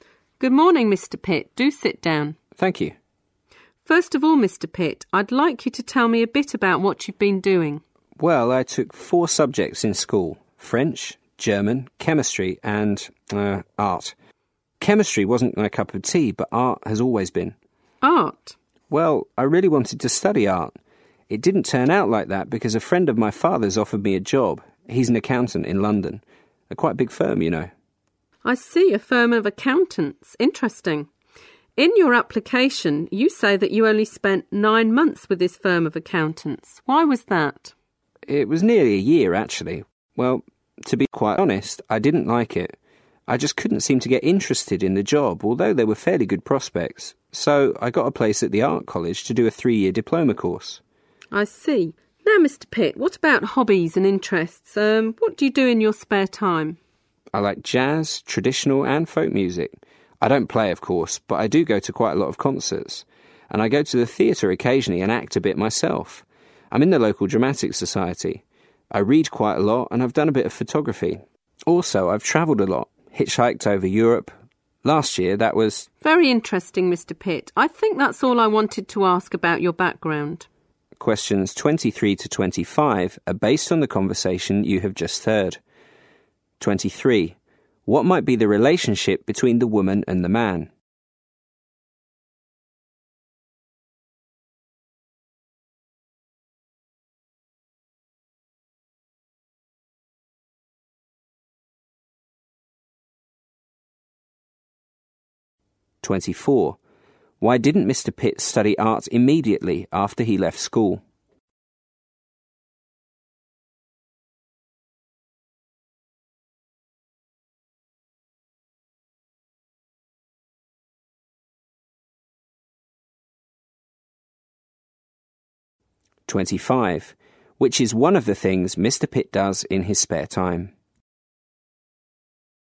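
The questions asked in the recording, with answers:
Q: Why didn't Mr. Pitt study art immediately after he left school?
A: A friend of his father's offered him a job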